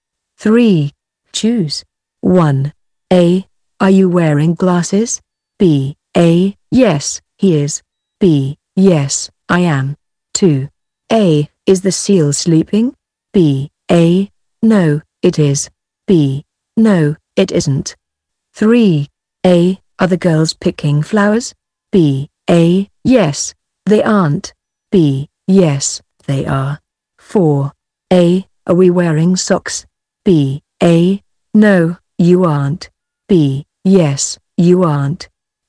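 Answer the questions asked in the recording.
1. B: Yes, I am.
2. B: No, it isn't.
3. B: Yes, they are.
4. A: No, you aren't.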